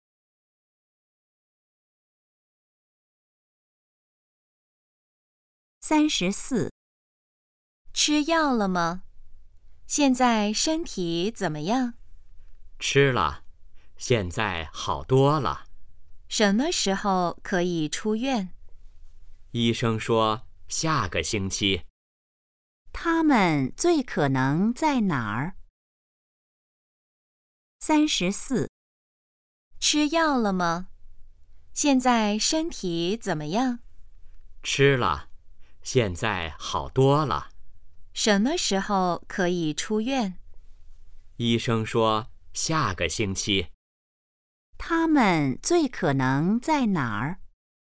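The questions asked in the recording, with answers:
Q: 他们最可能在哪儿?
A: 医院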